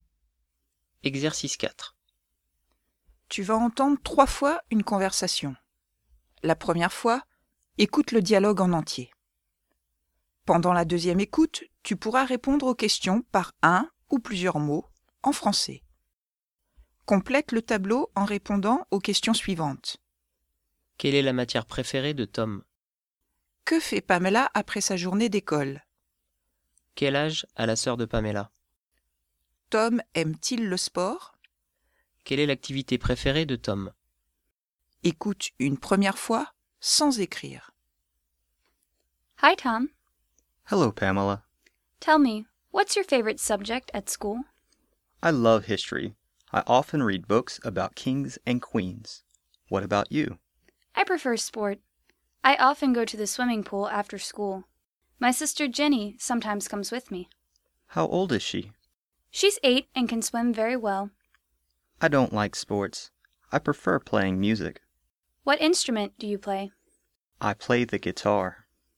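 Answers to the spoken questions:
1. l'histoire
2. elle va à la piscine
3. 8 ans
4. non
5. jouer de la musique (la guitare)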